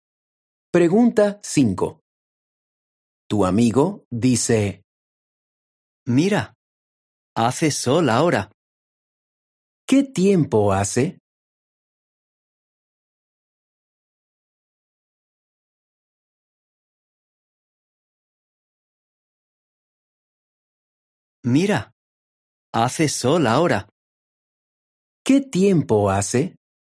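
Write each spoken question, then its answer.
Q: ¿Qué tiempo hace?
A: hace sol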